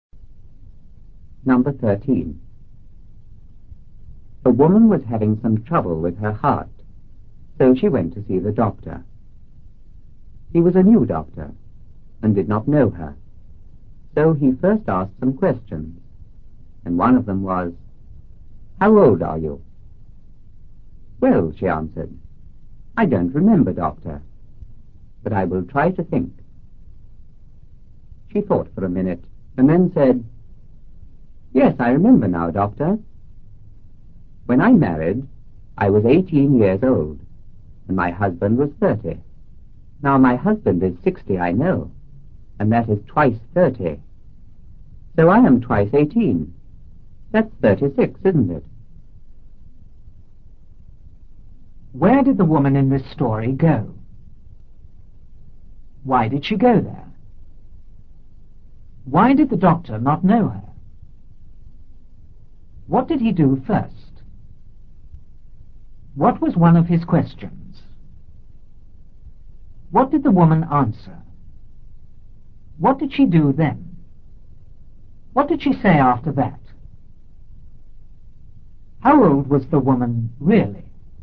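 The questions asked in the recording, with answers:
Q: Where did the woman in this story go?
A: To the doctor

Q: Why did she go there?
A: She was having some trouble with her heart

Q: Why did the doctor not know her?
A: He was a new doctor

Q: What did he do first?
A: He asked her some questions

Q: What was one of his questions?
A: How old are you?

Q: What did the woman answer?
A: She didn't remember but would try to think

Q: What did she do then?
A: She thought for a minute

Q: What did she say after that?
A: She was 18 when she married and her husband was 30; now he is 60, twice 30, so she is twice 18, 36

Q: How old was the woman really?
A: 48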